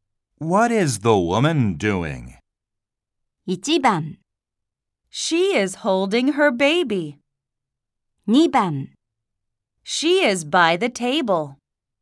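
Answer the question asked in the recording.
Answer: 1: She is holding her baby.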